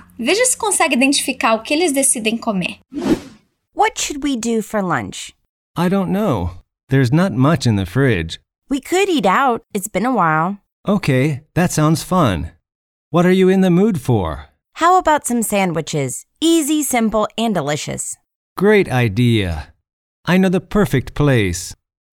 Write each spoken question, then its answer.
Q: Veja se consegue identificar o que eles decidem comer.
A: Parece que eles decidiram comer sanduíches.